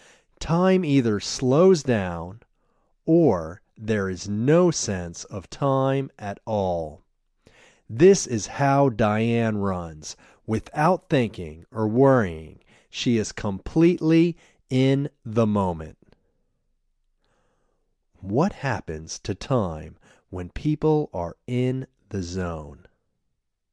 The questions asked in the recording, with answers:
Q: What happens to time when people are in the zone?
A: Time either slows down or there is no sense of time at all.